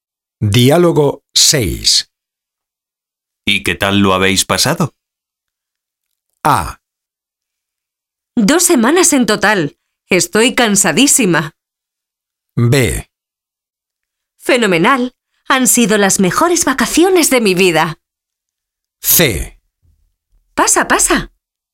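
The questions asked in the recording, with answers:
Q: ¿Y qué tal lo habéis pasado?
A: B: Fenomenal. Han sido las mejores vacaciones de mi vida.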